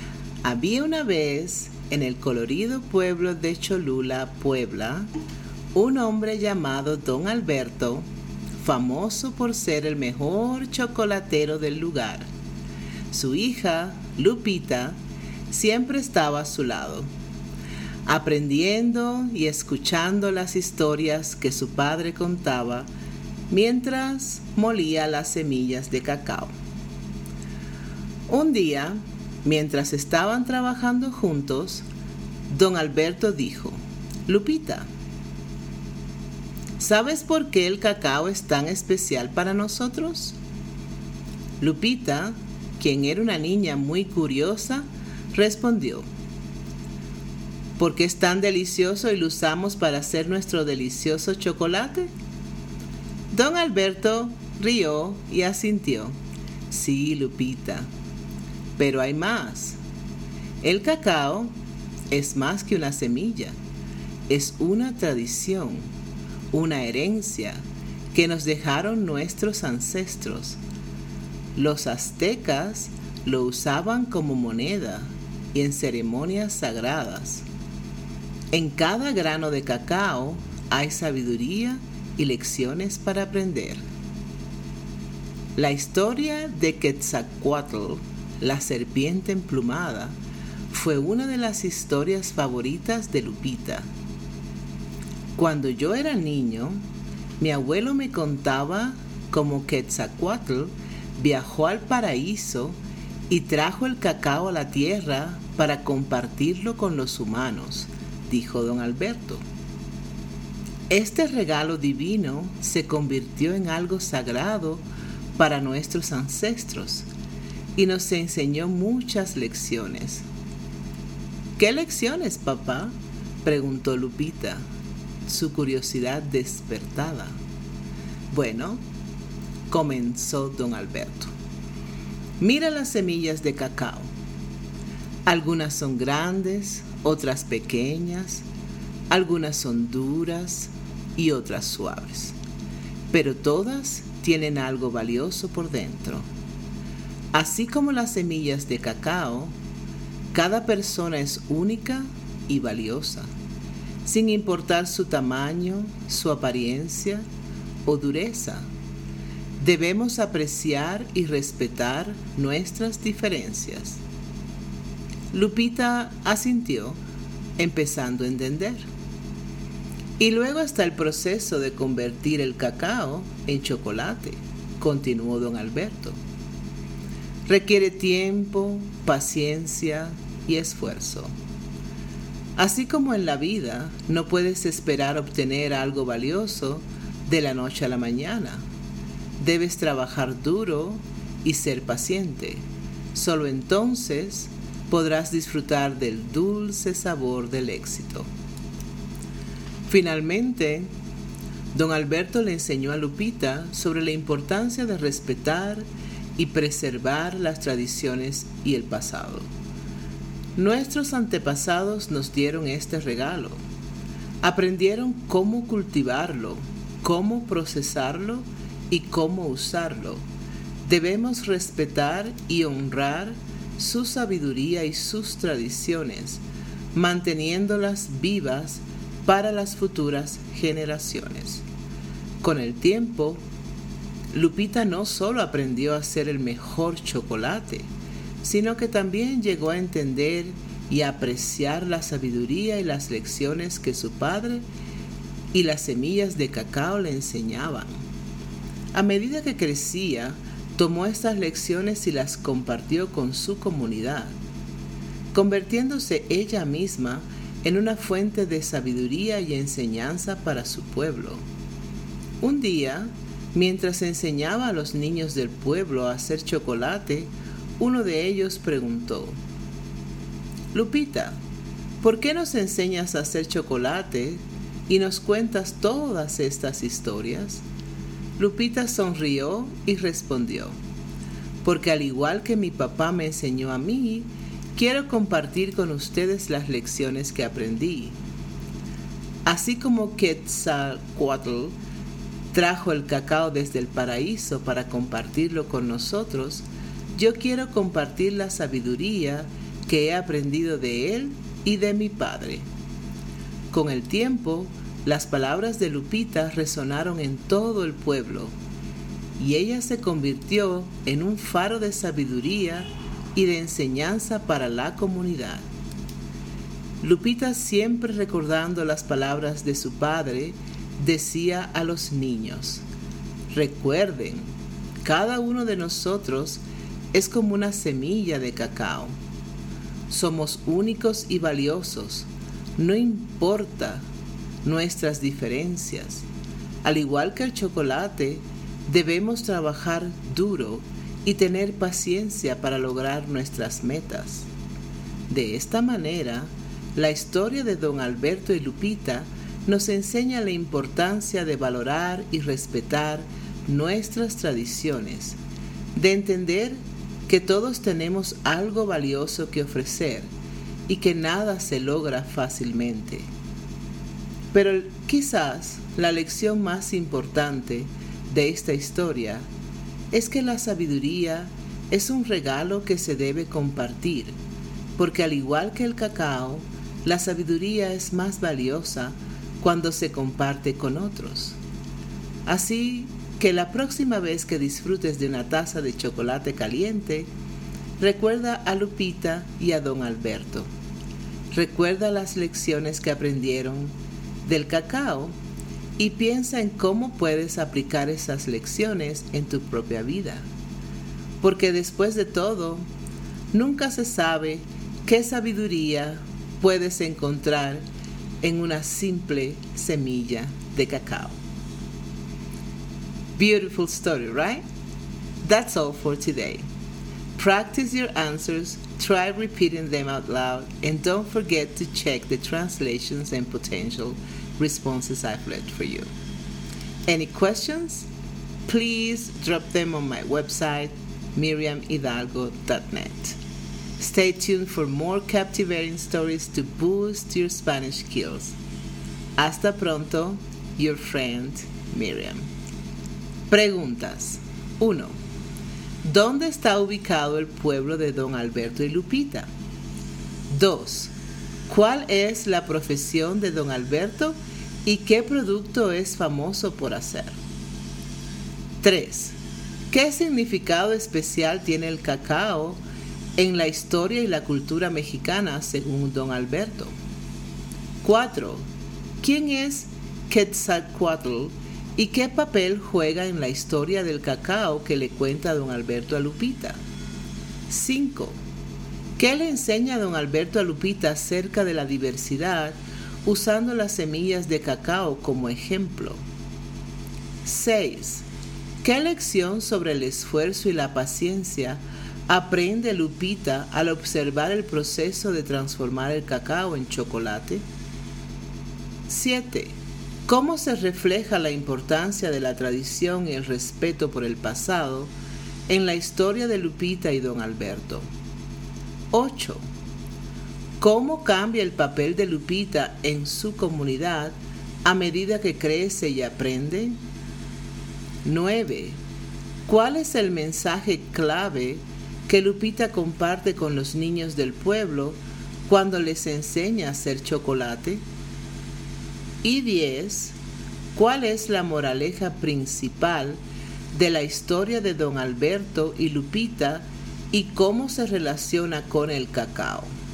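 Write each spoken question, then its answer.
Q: ¿Dónde está ubicado el pueblo de don Alberto y Lupita?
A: En Cholula, Puebla (México)

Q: ¿Cuál es la profesión de don Alberto y qué producto es famoso por hacer?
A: Es chocolatero; famoso por hacer chocolate

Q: ¿Qué significado especial tiene el cacao en la historia y la cultura mexicana según don Alberto?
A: Es una tradición y herencia de los ancestros; los aztecas lo usaban como moneda y en ceremonias sagradas

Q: ¿Quién es Quetzalcoatl ¿Y qué papel juega en la historia del cacao que le cuenta don Alberto a Lupita?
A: La serpiente emplumada; viajó al paraíso y trajo el cacao a la tierra para compartirlo con los humanos

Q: ¿Qué le enseña don Alberto a Lupita acerca de la diversidad usando las semillas de cacao como ejemplo?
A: Que cada persona es única y valiosa sin importar tamaño, apariencia o dureza; hay que respetar las diferencias

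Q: ¿Qué lección sobre el esfuerzo y la paciencia aprende Lupita al observar el proceso de transformar el cacao en chocolate?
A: Que lo valioso requiere tiempo, paciencia y trabajo duro; no se obtiene de la noche a la mañana

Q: cómo se refleja la importancia de la tradición y el respeto por el pasado en la historia de Lupita y don Alberto.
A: Hay que respetar y honrar la sabiduría de los antepasados y mantener vivas sus tradiciones para las futuras generaciones

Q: ¿Cómo cambia el papel de Lupita en su comunidad a medida que crece y aprende?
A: Se convierte en fuente de sabiduría y enseñanza para su pueblo, enseñando a los niños

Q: ¿Cuál es el mensaje clave que Lupita comparte con los niños del pueblo cuando les enseña a hacer chocolate?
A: Que cada uno es como una semilla de cacao, único y valioso, y que hay que trabajar duro y tener paciencia para lograr las metas

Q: ¿Cuál es la moraleja principal de la historia de don Alberto y Lupita y cómo se relaciona con el cacao?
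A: La sabiduría es un regalo que se debe compartir; como el cacao, es más valiosa cuando se comparte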